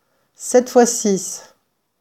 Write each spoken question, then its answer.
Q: 7 fois 6,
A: 42.